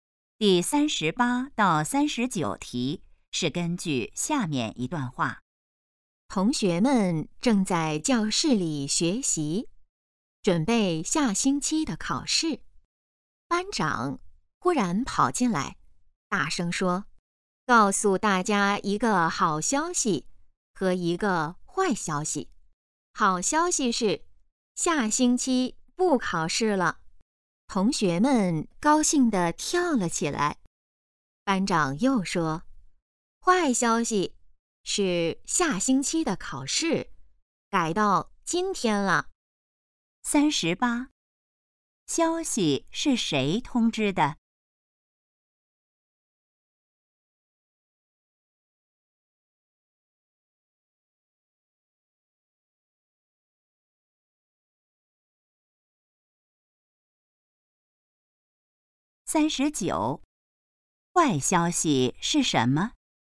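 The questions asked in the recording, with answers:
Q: 消息是谁通知的?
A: 班长

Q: 坏消息是什么?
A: 下星期的考试改到今天了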